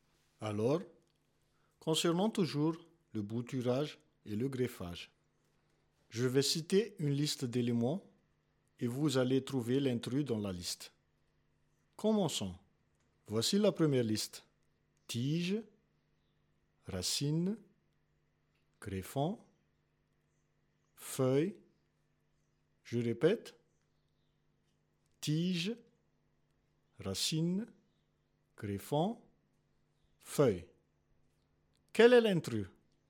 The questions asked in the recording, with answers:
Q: Quel est l'intrus?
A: L'intrus, c'est greffon.